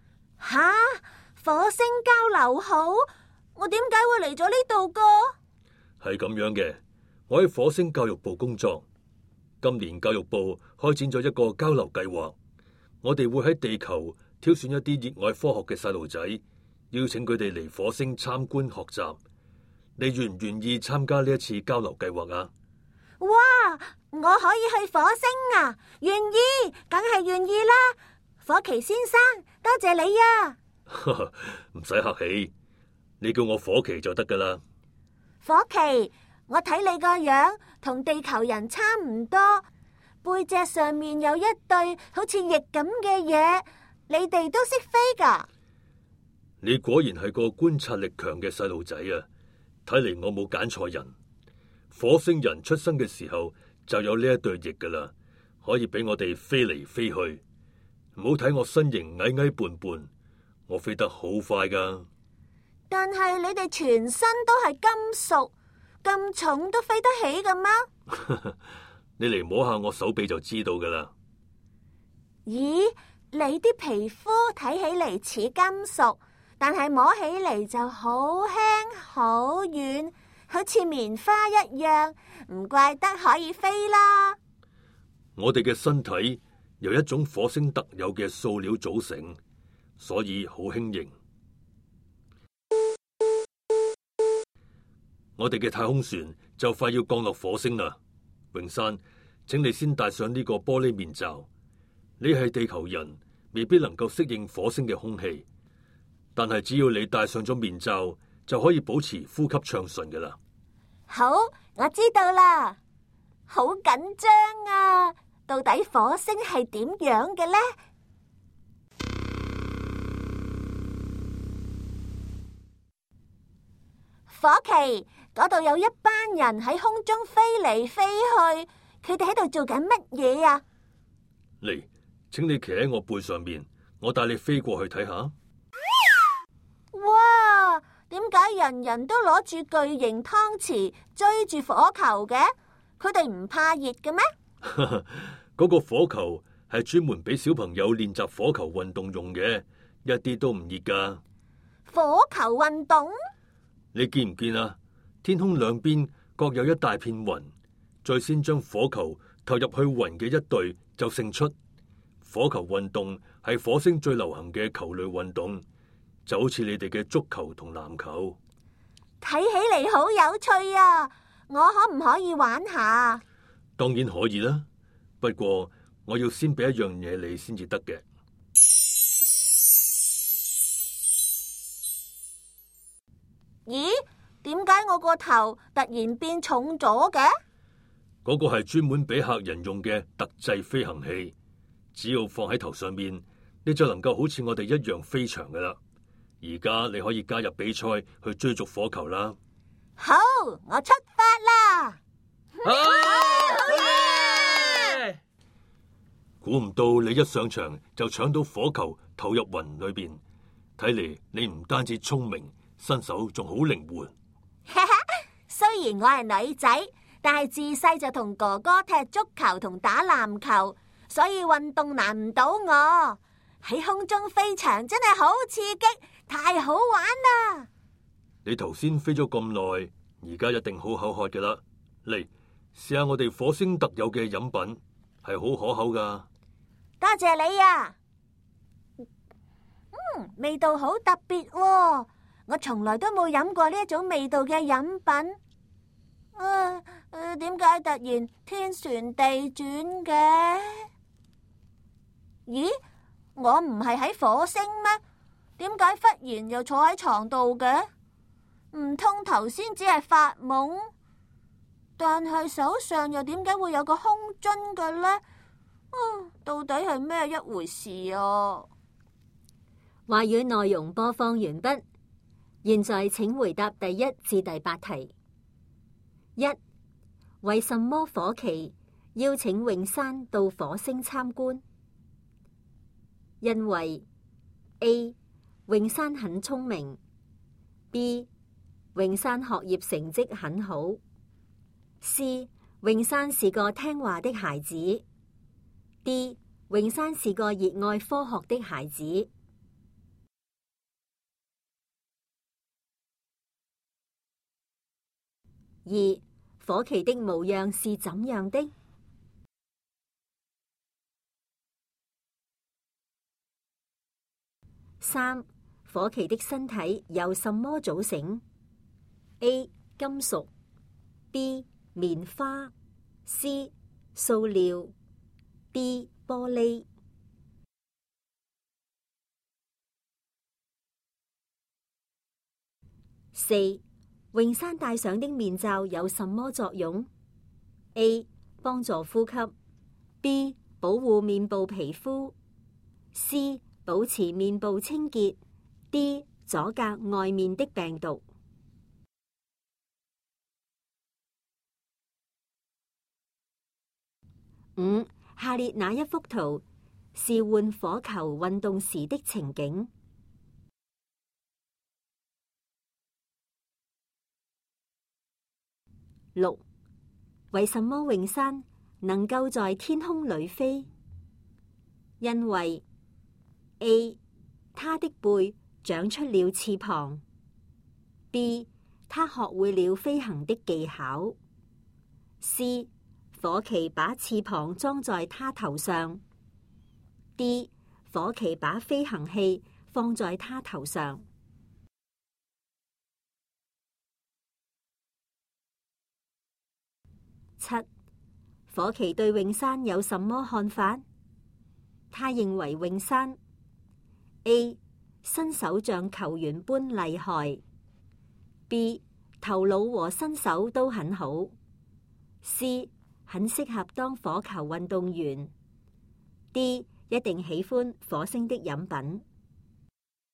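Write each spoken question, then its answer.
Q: 为什么火旗邀请永山到火星参观?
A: D: 永山是个热爱科学的孩子

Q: 火旗的身体由什么组成 ?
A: C: 塑料

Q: 永山戴上的面罩有什么作用 ?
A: A: 帮助呼吸

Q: 为什么永山能够在天空里飞?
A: D: 火旗把飞行器放在他头上

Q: 火旗对永山有什么看法?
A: B: 头脑和身手都很好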